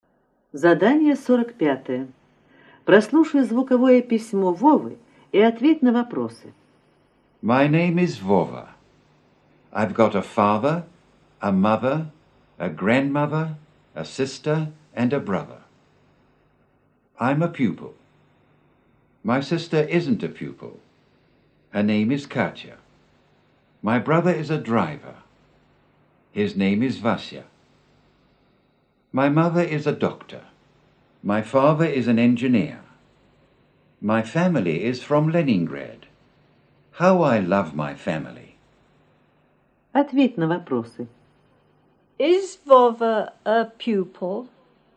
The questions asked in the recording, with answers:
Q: Is Vova a pupil?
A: Yes, he is.